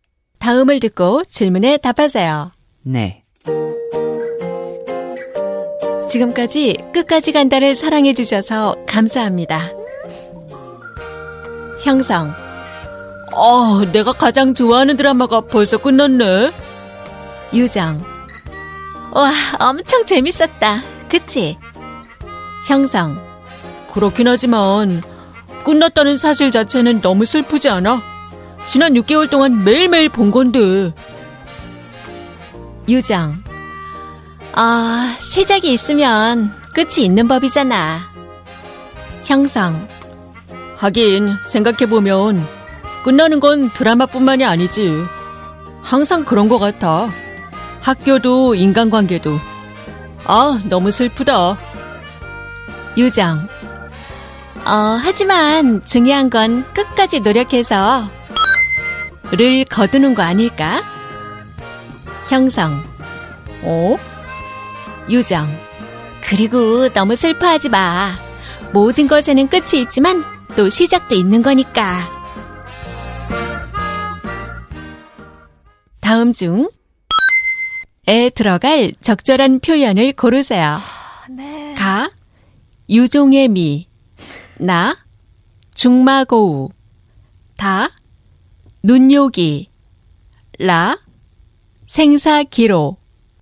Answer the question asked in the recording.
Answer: 가, 유종의미, which we chose, might be the right answer.